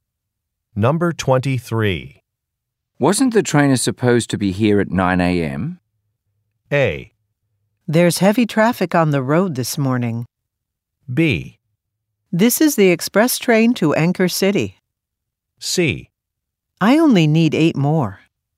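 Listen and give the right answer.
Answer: A: There's heavy traffic on the road this morning.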